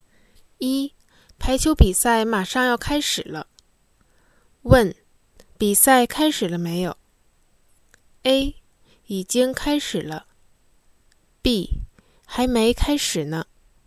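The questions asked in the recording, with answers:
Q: 比赛开始了没有?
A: B: 还没开始呢。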